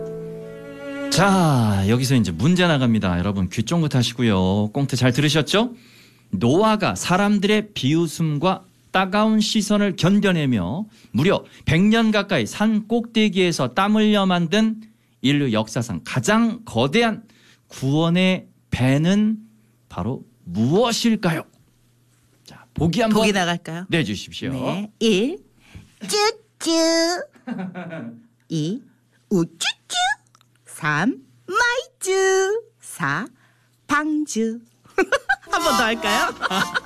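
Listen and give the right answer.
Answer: 4: 방쭈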